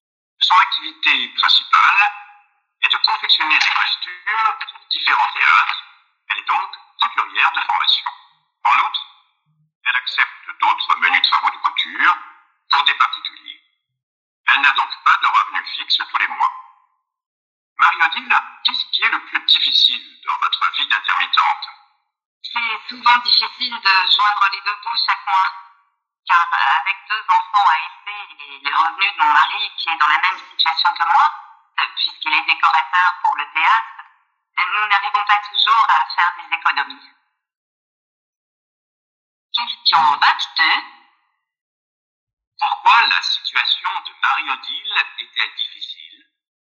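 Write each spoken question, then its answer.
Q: Pourquoi la situation de Marie-Odile est-elle difficile?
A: Elle n'a pas de revenus fixes : avec deux enfants et un mari intermittent lui aussi, c'est dur de joindre les deux bouts chaque mois.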